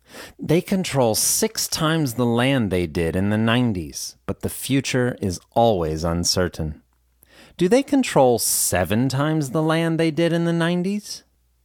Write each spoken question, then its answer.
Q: Do they control seven times the land they did in the 90s?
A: No, they control six times the land they did in the 90s.